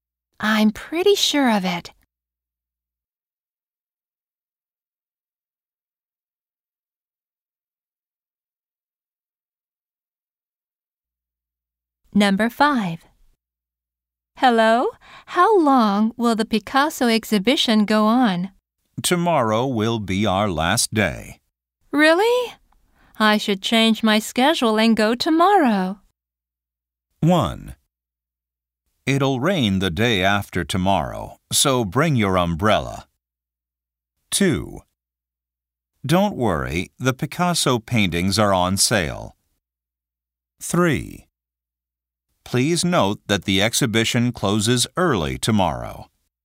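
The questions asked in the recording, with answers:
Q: Really? I should change my schedule and go tomorrow.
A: 3: Please note that the exhibition closes early tomorrow.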